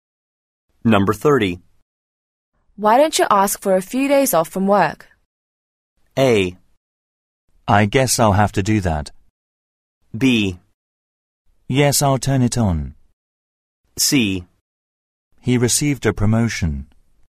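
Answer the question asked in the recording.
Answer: A: I guess I'll have to do that.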